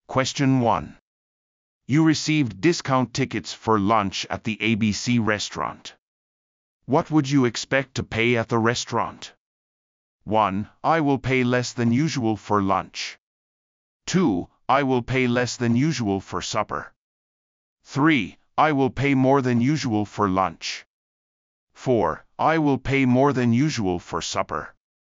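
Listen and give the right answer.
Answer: 1: I will pay less than usual for lunch.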